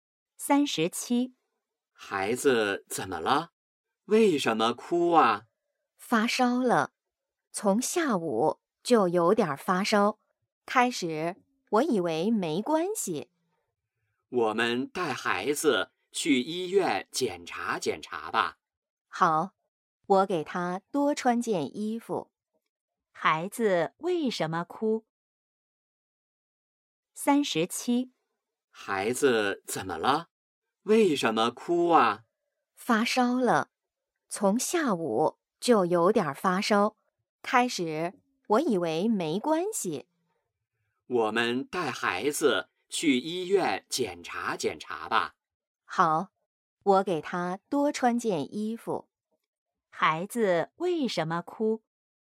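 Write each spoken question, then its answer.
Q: 孩子为什么哭?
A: 发烧了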